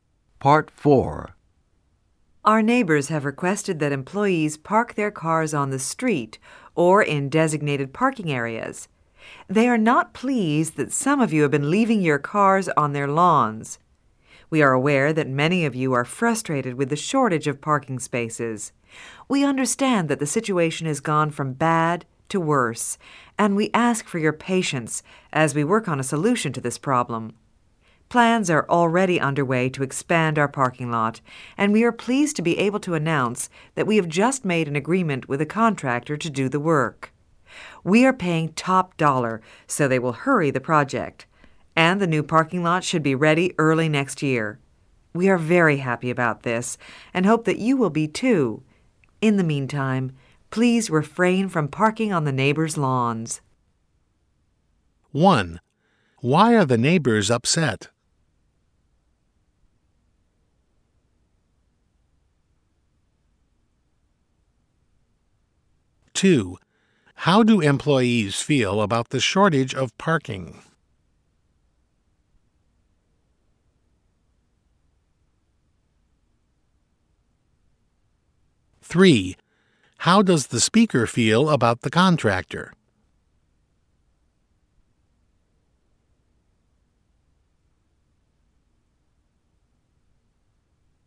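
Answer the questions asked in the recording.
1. Employees leave cars on their lawns
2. Frustrated
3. Very happy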